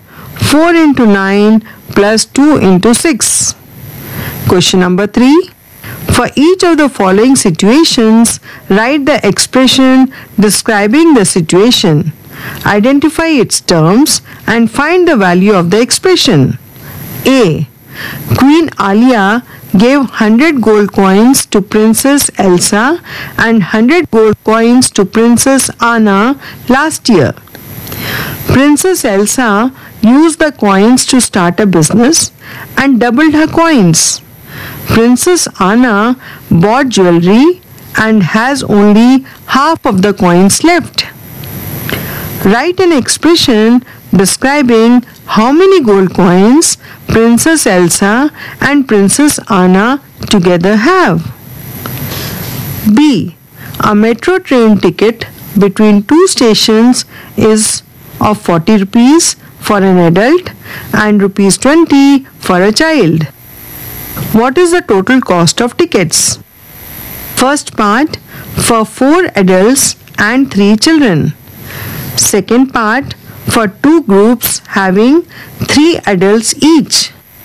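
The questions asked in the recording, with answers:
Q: Write an expression describing how many gold coins Princess Elsa and Princess Anna together have.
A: 2 × 100 + 100 ÷ 2 = 250 gold coins

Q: Second part, for 2 groups having 3 adults each.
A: 2 × (3 × 40) = 240 rupees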